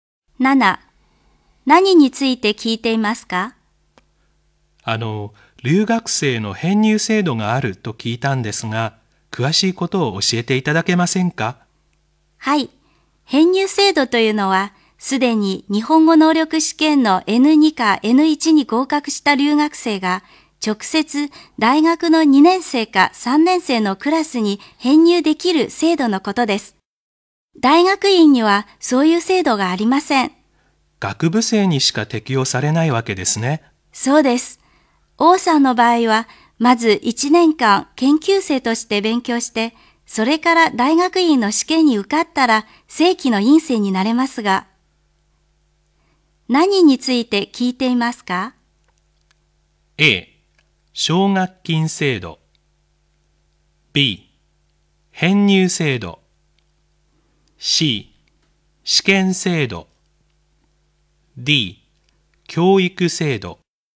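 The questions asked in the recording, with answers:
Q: 何について聞いていますか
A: B: 編入制度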